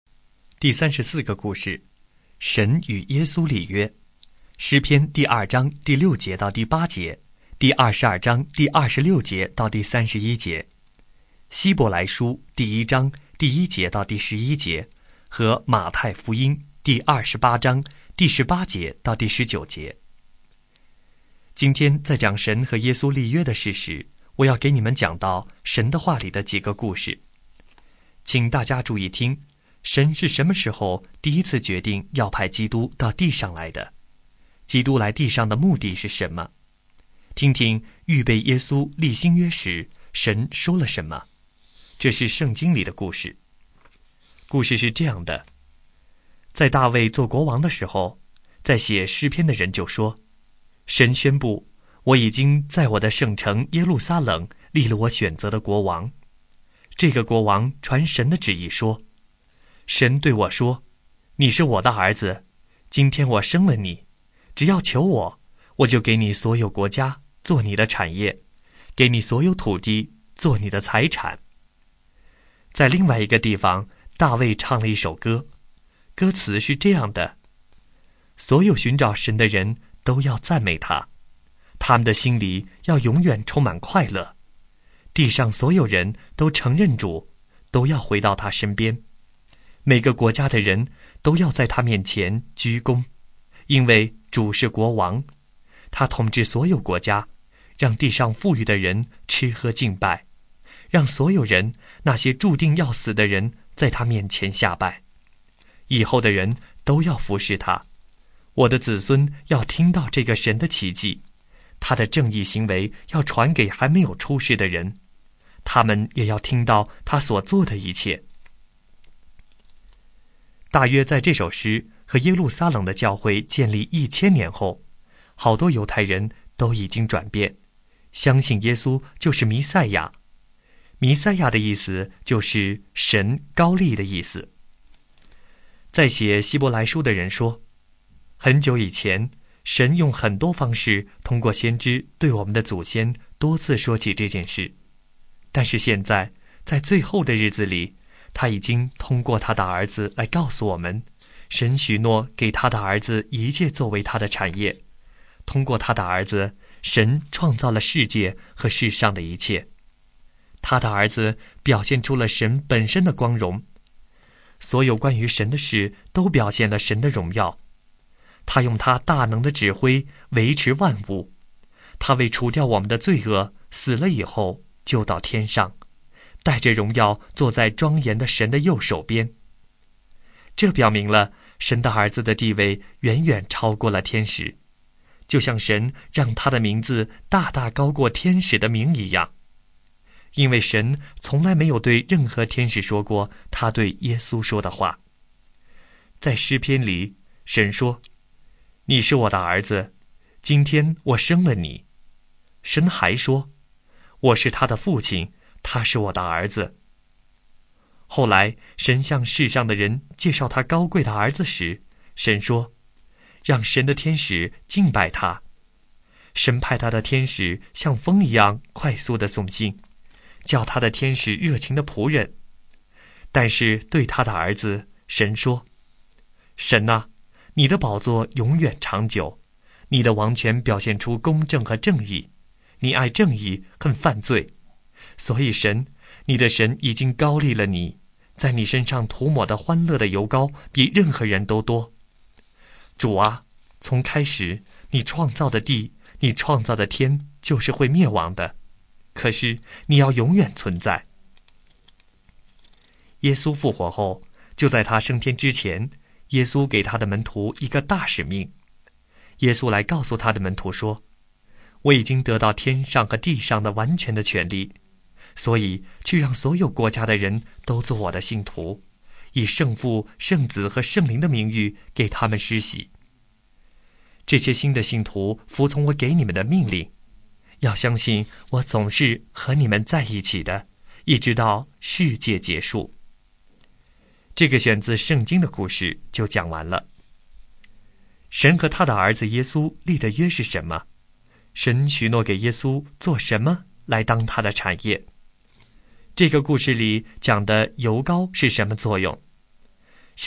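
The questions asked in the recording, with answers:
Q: 神许诺给耶稣做什么来当他的产业?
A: 所有国家(和所有土地)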